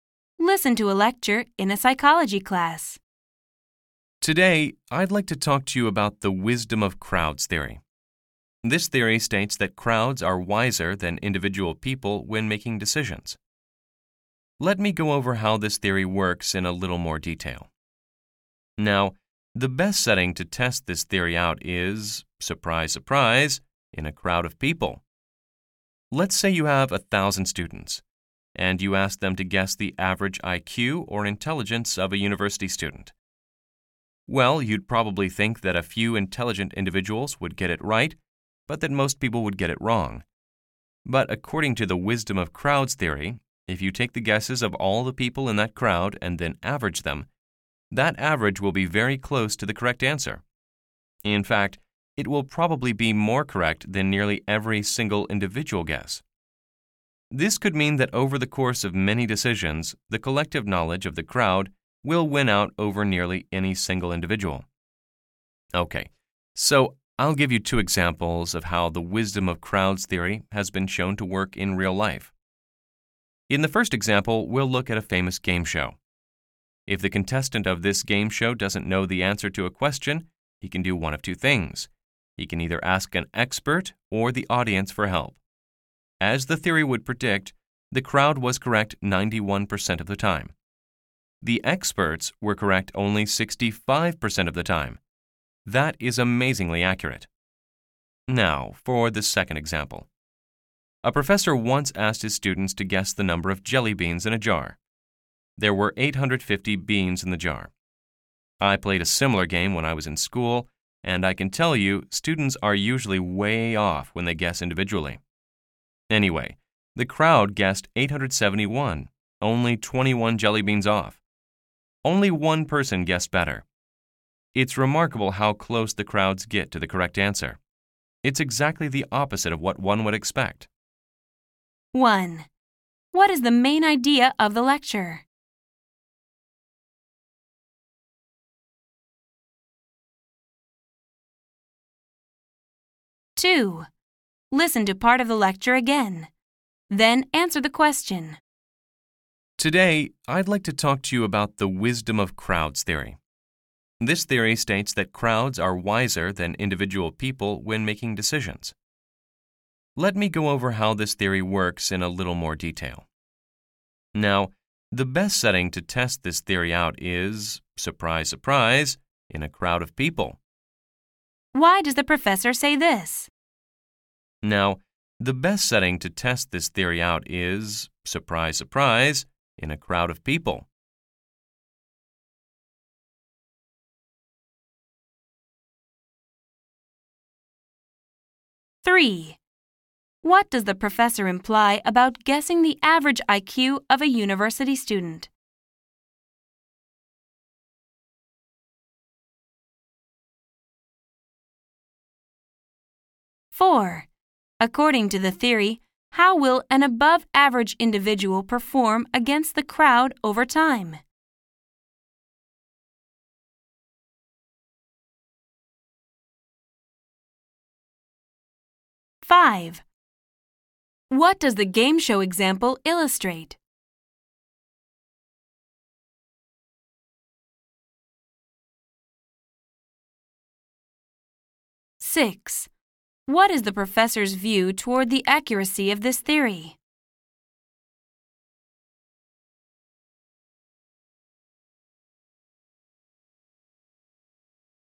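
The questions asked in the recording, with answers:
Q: What is the main idea of the lecture?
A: Crowds' averaged guesses are wiser than individuals' decisions (the wisdom of crowds theory)

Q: What does the professor imply about guessing the average IQ of a university student?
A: The crowd's average guess would be closer than nearly any individual guess

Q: According to the theory, how will an above-average individual perform against the crowd over time?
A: The crowd will usually win out over the individual

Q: What does the game show example illustrate?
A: The audience (crowd) was more accurate than experts, 91% vs 65%

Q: What is the professor's view toward the accuracy of this theory?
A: The professor finds it remarkably accurate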